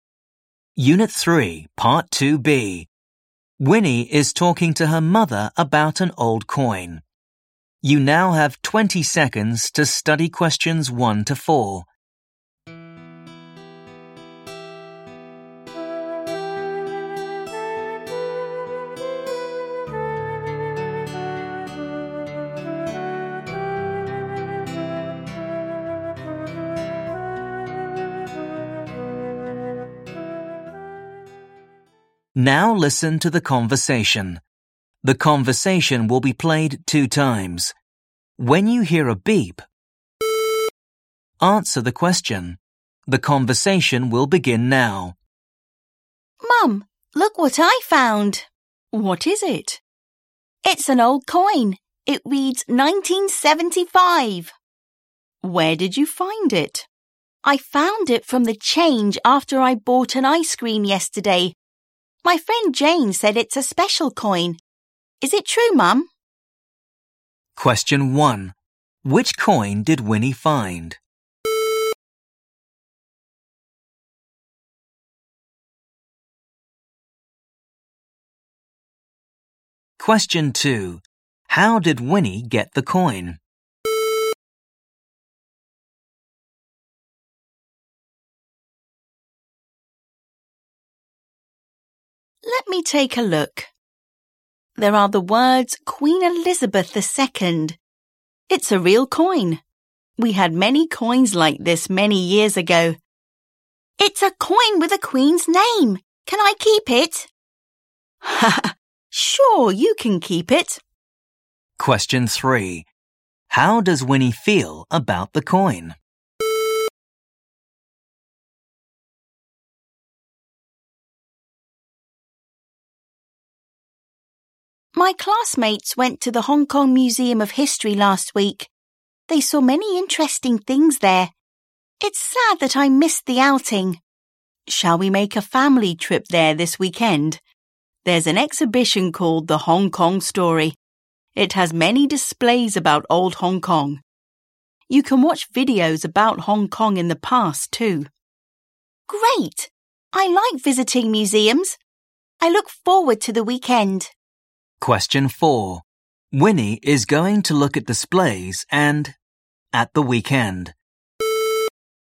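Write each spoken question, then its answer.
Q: Which coin did Winnie find?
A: An old coin from 1975

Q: How did Winnie get the coin?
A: From the change after she bought an ice cream

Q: Winnie is going to look at displays and at the weekend.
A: watch videos about Hong Kong in the past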